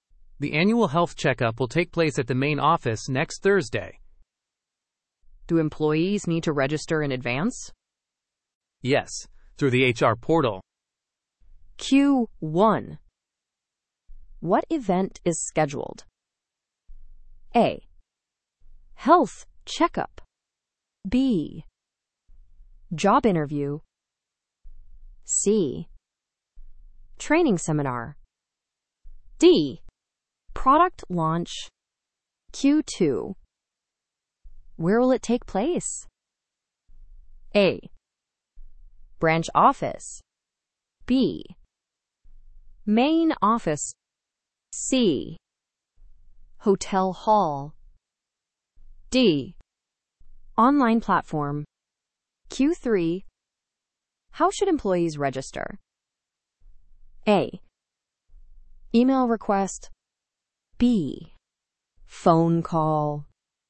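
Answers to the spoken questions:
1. A: Health checkup.
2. B: Main office.
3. C: HR portal.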